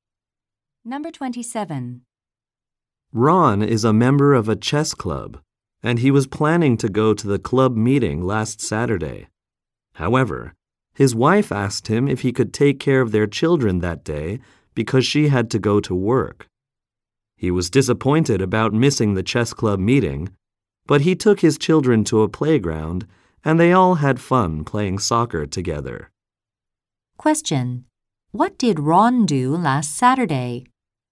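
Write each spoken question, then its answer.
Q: What did Ron do last Saturday?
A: He took care of his children and played soccer with them at a playground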